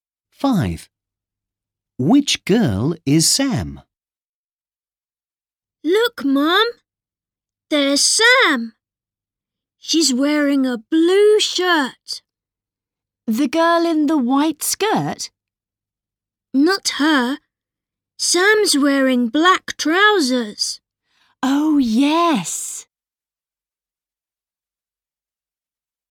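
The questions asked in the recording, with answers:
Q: Which girl is Sam?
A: the girl in a blue shirt and black trousers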